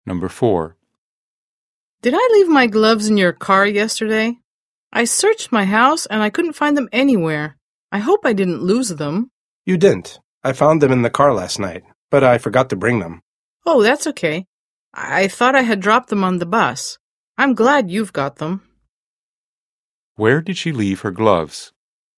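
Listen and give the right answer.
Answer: In the car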